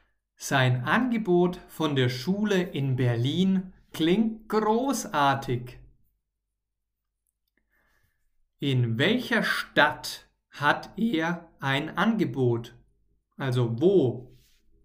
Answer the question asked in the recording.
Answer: In Berlin. Er hat in Berlin ein Angebot.